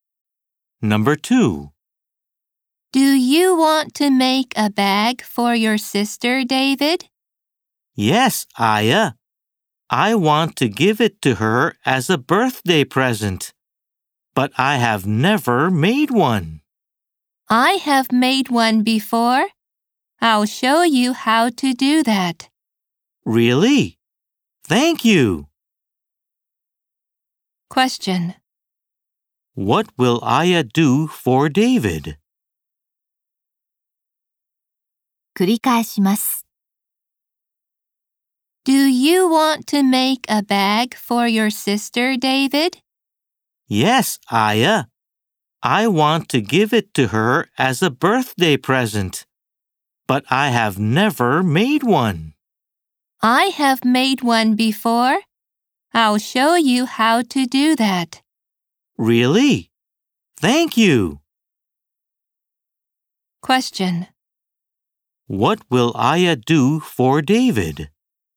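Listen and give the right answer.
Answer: She will show him how to make a bag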